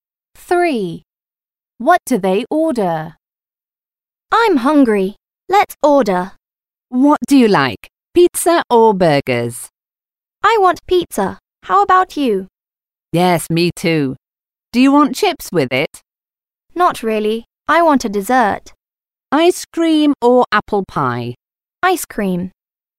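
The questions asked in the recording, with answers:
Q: What do they order?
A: Pizza and ice cream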